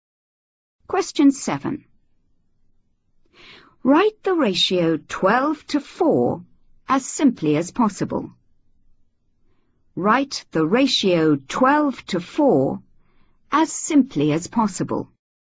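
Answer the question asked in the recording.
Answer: 3:1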